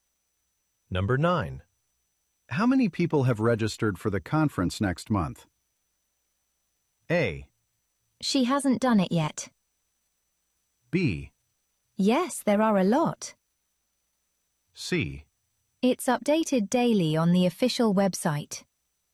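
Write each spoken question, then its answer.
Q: How many people have registered for the conference next month?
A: C: It's updated daily on the official website.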